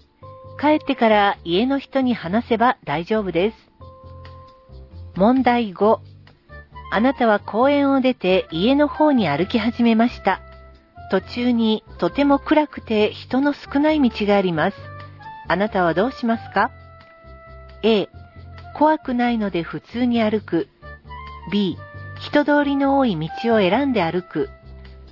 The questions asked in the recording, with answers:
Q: あなたはどうしますか?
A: 正解は B. 人通りの多い道を選んで歩くです。